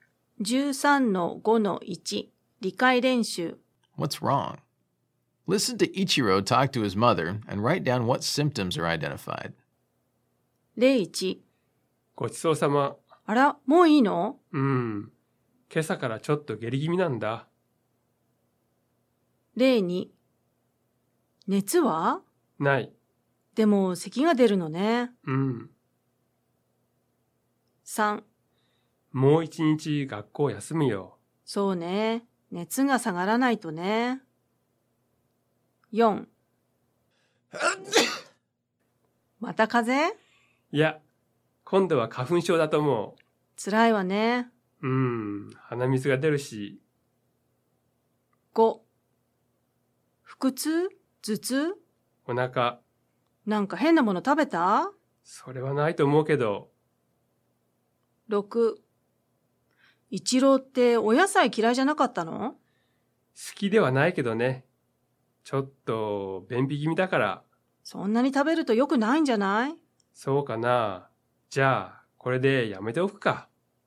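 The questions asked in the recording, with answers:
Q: What's wrong? Listen to Ichiro talk to his mother and write down what symptoms are identified.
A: diarrhea

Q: What's wrong? Listen to Ichiro talk to his mother and write down what symptoms are identified.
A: fever

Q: What's wrong? Listen to Ichiro talk to his mother and write down what symptoms are identified.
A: hay fever, runny nose

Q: What's wrong? Listen to Ichiro talk to his mother and write down what symptoms are identified.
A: stomachache

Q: What's wrong? Listen to Ichiro talk to his mother and write down what symptoms are identified.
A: constipation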